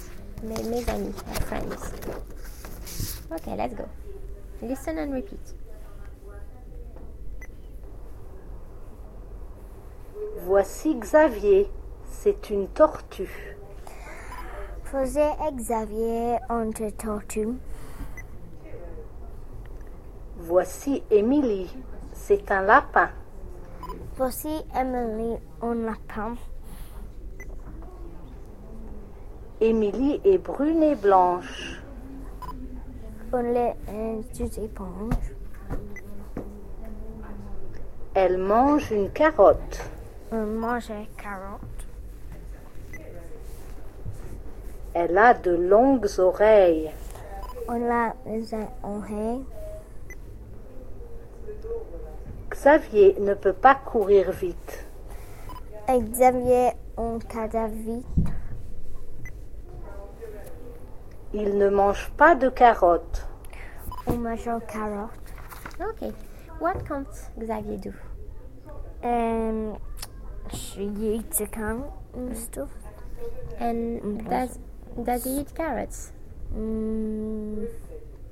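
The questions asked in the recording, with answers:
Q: And does he eat carrots?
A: No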